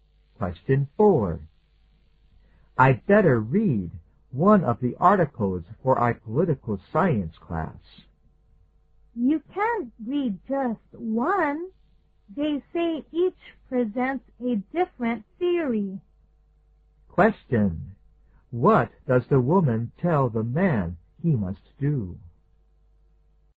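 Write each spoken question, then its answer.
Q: What does the woman tell the man he must do?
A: Read all of the articles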